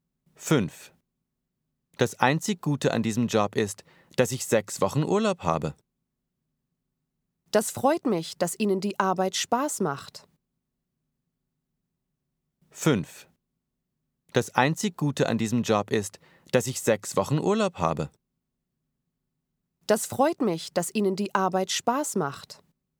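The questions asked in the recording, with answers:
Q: Das einzig Gute an diesem Job ist, dass ich 6 Wochen Urlaub habe. Das freut mich, dass Ihnen die Arbeit Spaß macht.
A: U: unlogisch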